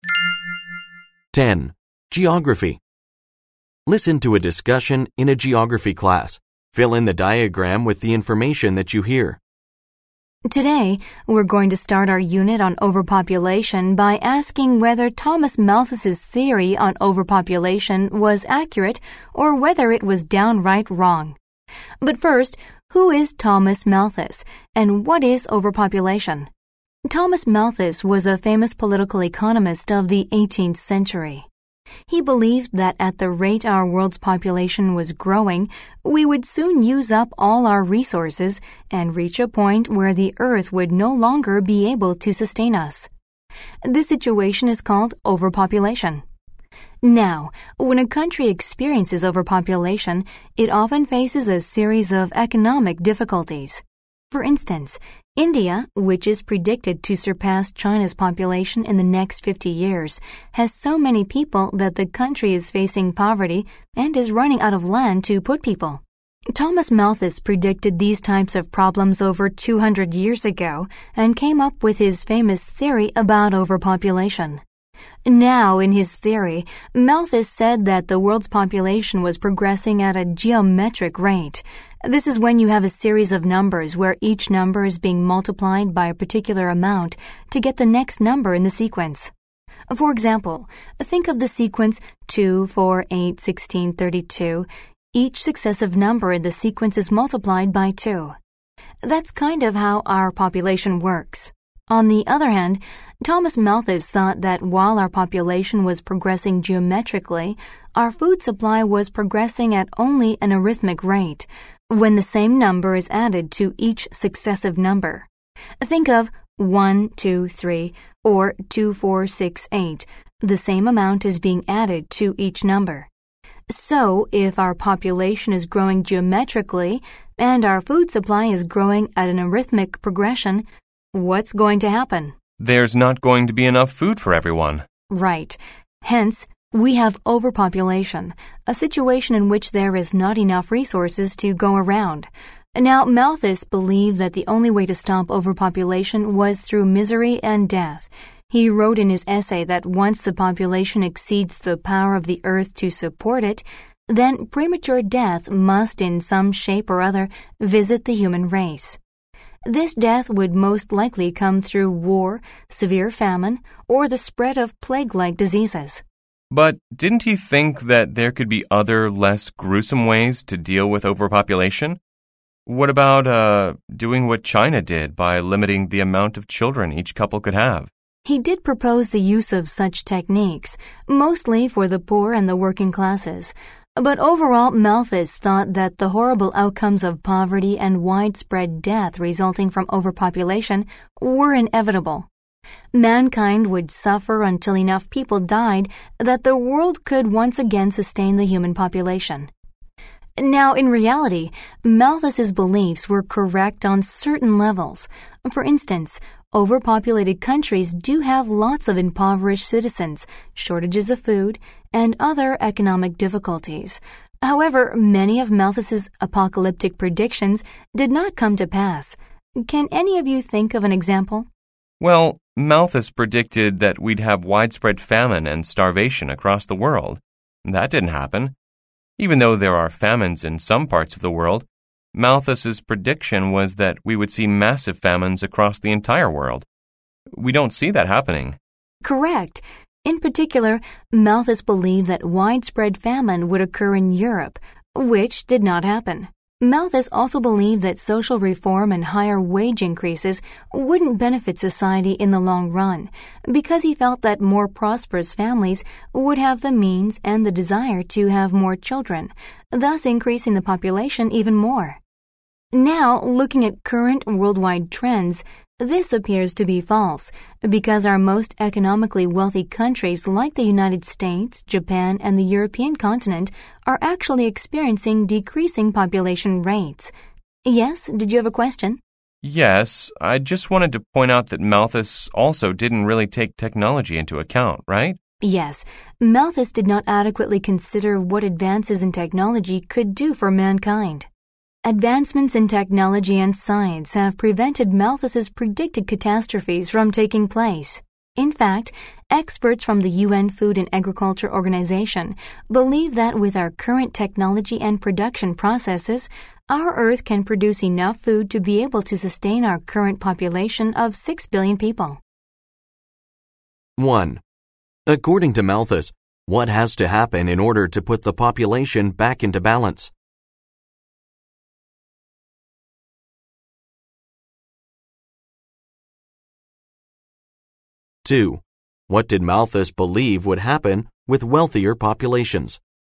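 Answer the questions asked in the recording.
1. Misery and premature death, through war, famine or disease, until the Earth can support the population again
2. They would have more children, increasing the population even more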